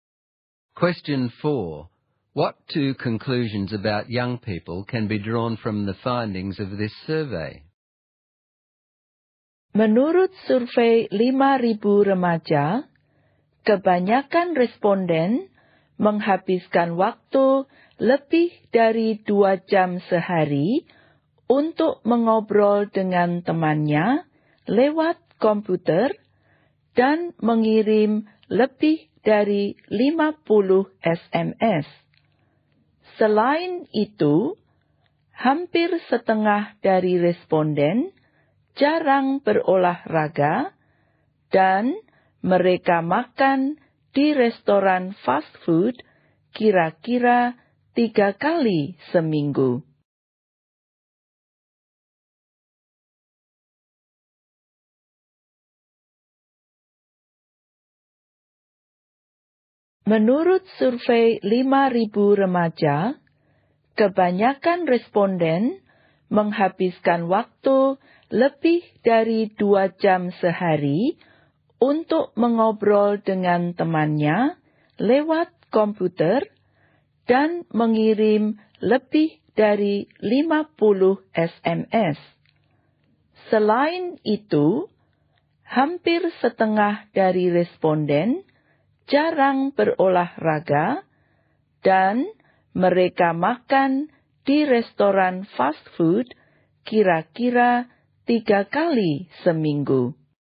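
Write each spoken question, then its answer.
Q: What 2 conclusions about young people can be drawn from the findings of this survey?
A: They spend a lot of time communicating with friends by computer and SMS, and many have unhealthy lifestyles (little exercise, frequent fast food)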